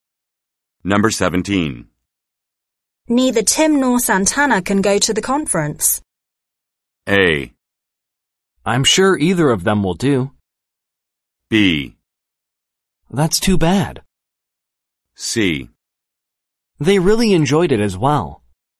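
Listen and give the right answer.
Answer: B: That's too bad.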